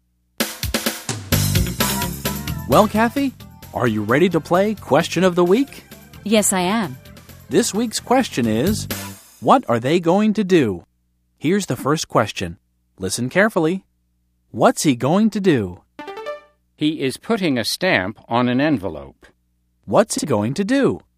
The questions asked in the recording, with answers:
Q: What's he going to do?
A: He's going to mail a letter.